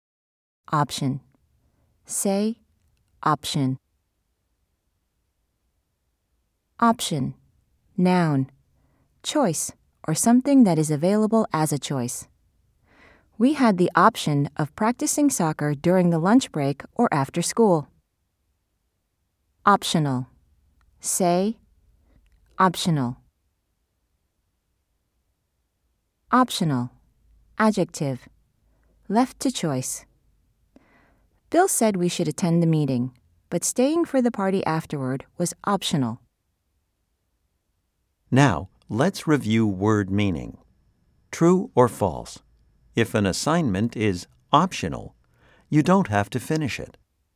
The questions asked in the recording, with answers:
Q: True or false? If an assignment is optional, you don't have to finish it.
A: If you said true, you are correct.